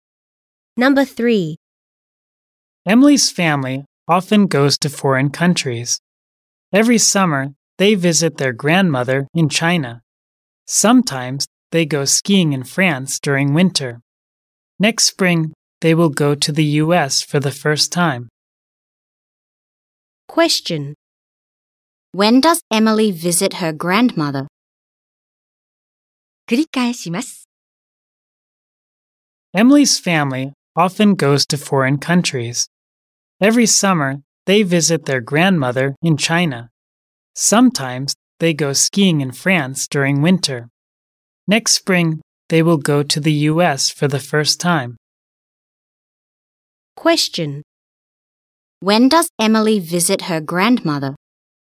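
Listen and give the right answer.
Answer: Every summer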